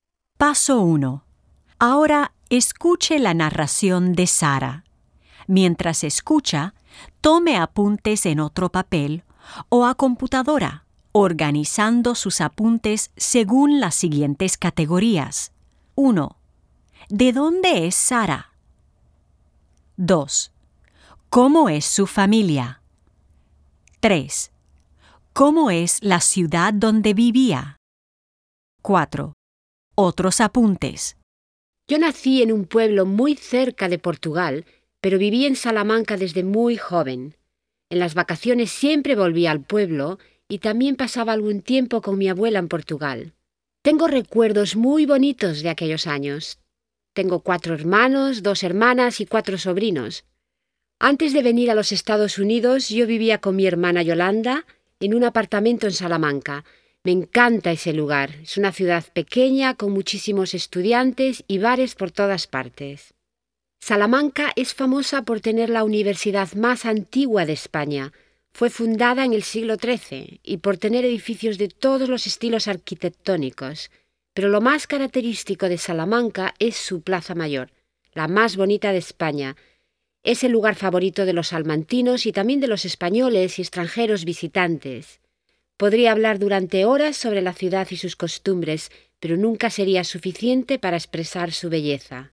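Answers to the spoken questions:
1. De un pueblo muy cerca de Portugal; vivió en Salamanca desde muy joven
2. Tiene 4 hermanos, 2 hermanas y 4 sobrinos; vivía con su hermana Yolanda
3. Salamanca: pequeña, con muchísimos estudiantes y bares, la universidad más antigua de España y una Plaza Mayor muy bonita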